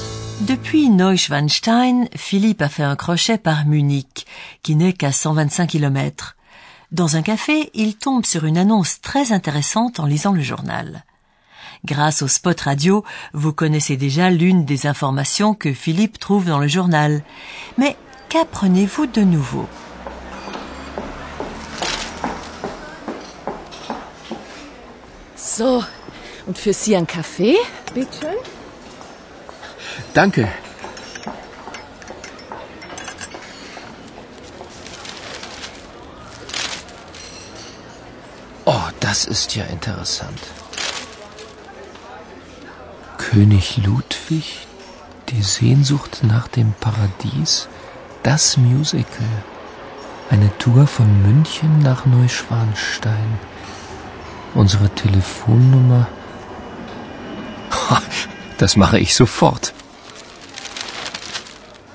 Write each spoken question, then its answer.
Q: Mais qu'apprenez-vous de nouveau?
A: L'information nouvelle est qu'il existe des bus qui proposent des excursions à Neuschwanstein au départ de Munich.